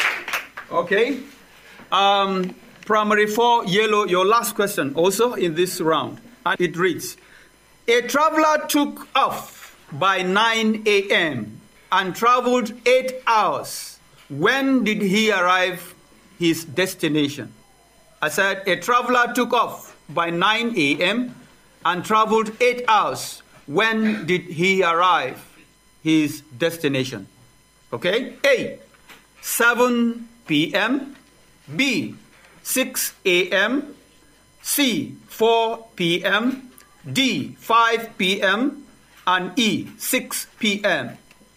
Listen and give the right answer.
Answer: D, 5 p.m.